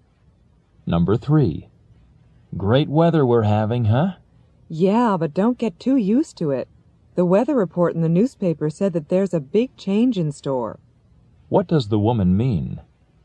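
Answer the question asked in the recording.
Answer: The good weather won't last; it is going to change.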